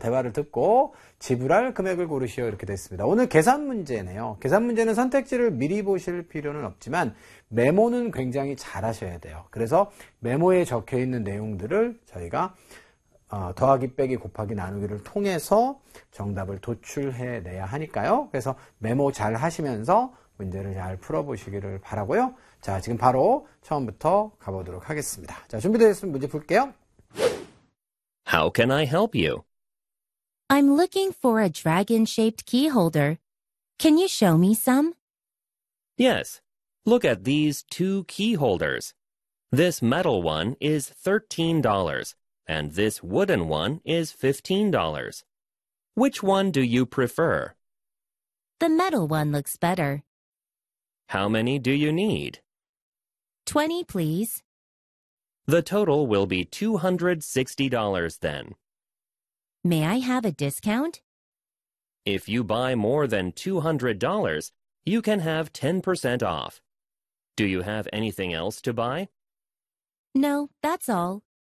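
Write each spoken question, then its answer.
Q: 대화를 듣고 지불할 금액을 고르시오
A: $234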